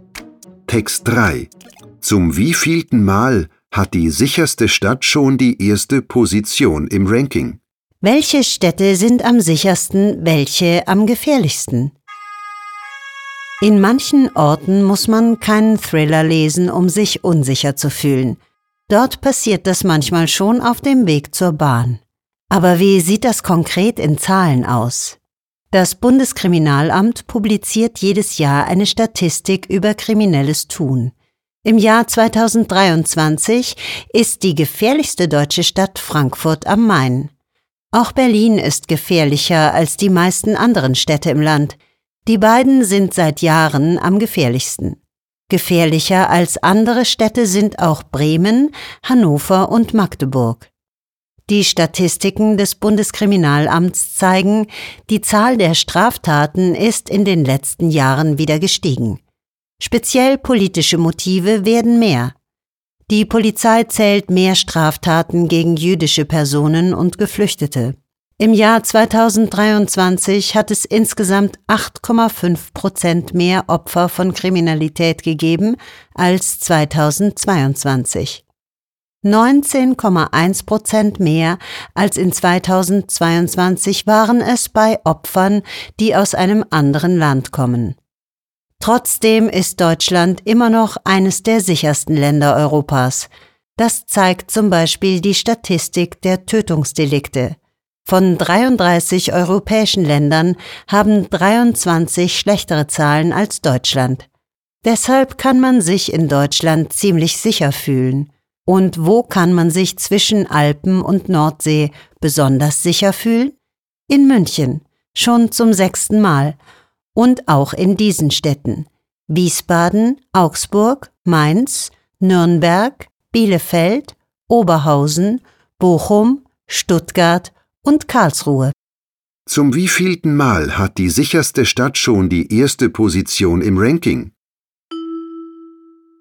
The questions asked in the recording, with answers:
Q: Zum wievielten Mal hat die sicherste Stadt schon die erste Position im Ranking?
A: Damit ist die Stadt zum 6.